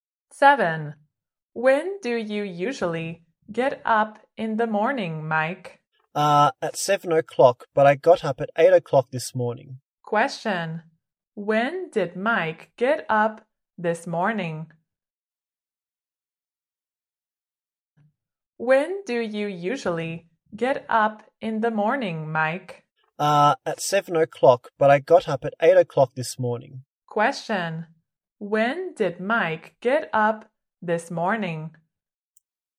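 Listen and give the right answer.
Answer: At 8 o'clock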